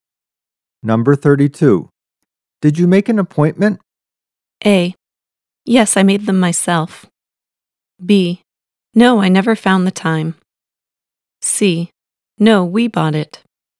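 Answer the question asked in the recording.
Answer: B: No, I never found the time.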